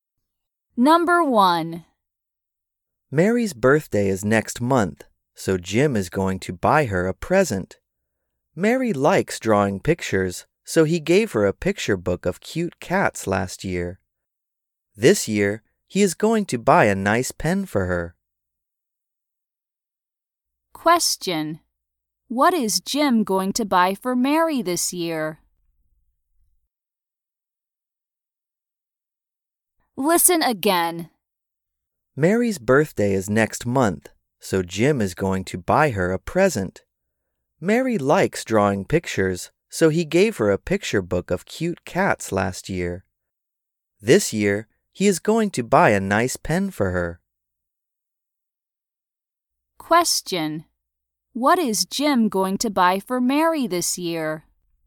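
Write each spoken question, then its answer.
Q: What is Jim going to buy for Mary this year?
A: A nice pen.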